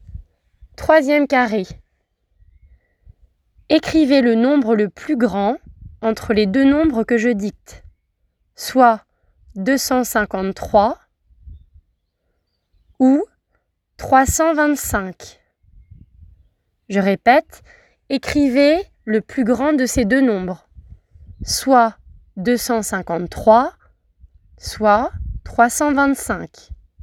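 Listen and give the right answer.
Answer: 325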